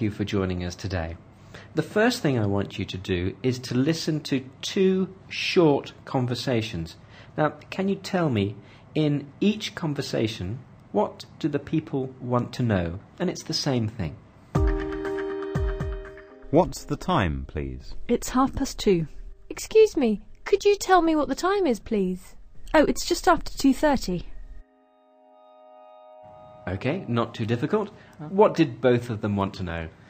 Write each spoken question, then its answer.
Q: What did both of them want to know?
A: She wanted to know what time it is.